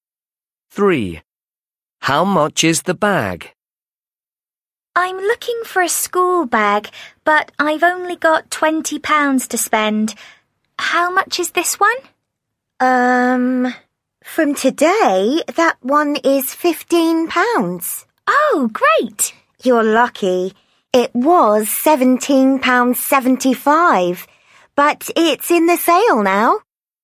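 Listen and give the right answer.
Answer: £15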